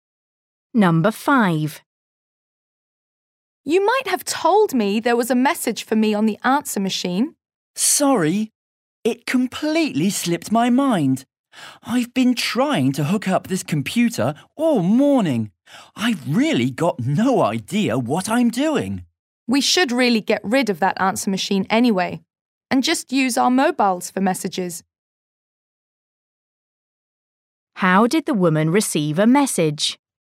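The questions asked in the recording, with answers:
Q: How did the woman receive a message?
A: on the answer machine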